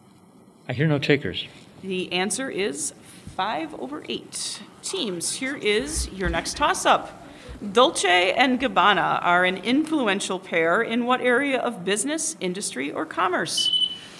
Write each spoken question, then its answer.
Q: Dolce and Gabbana are an influential pair in what area of business, industry, or commerce?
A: Good for 5 points.